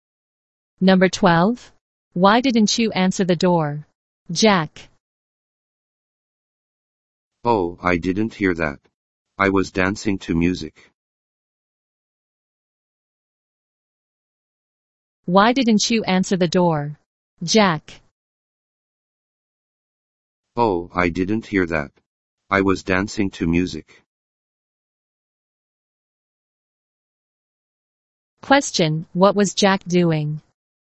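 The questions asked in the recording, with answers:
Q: what was Jack doing?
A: Dancing to music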